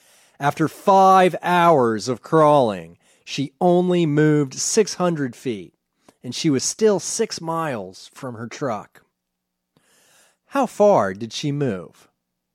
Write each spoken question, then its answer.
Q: How far did she move?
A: She only moved 600 feet.